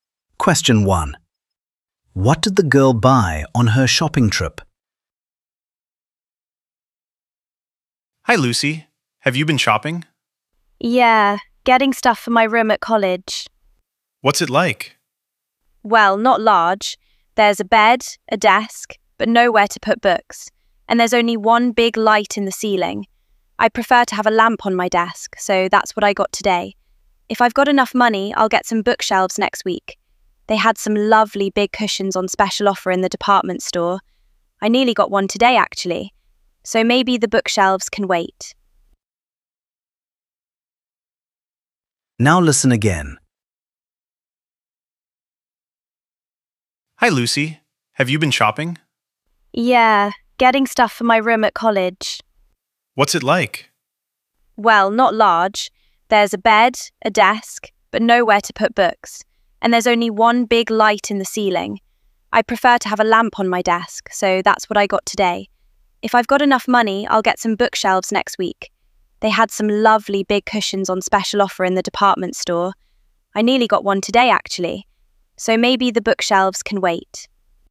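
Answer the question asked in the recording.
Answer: A desk lamp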